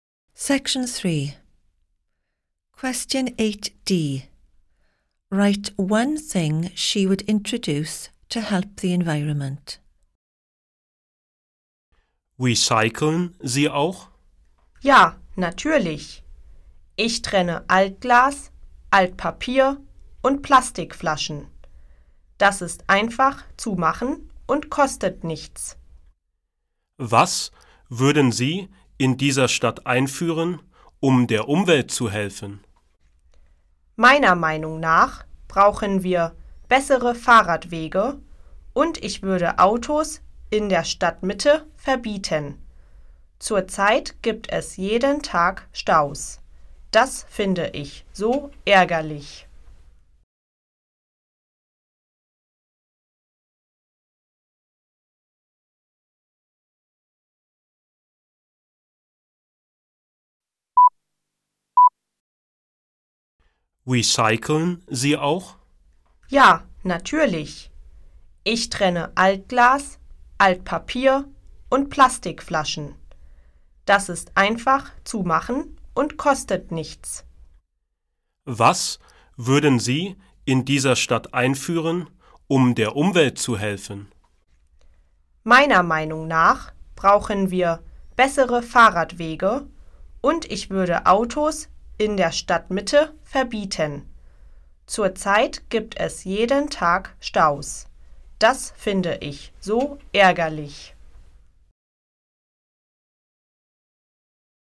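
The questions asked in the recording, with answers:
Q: Write one thing she would introduce to help the environment.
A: Better cycle paths (or banning cars in the town centre)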